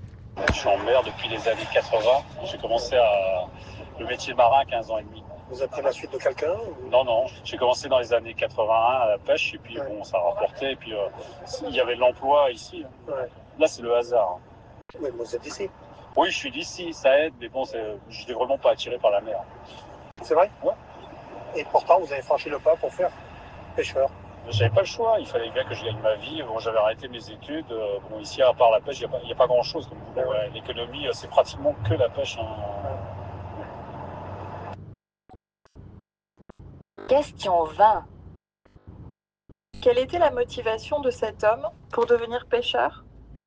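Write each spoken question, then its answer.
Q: Quelle était la motivation de cet homme pour devenir pêcheur ?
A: Gagner sa vie : il n'y avait pas d'autre travail que la pêche ici.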